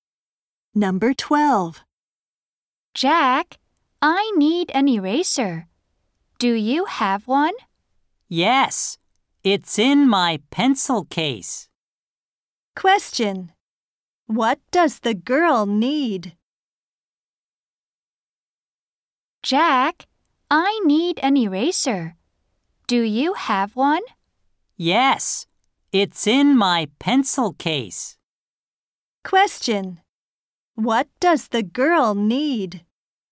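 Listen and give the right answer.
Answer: An eraser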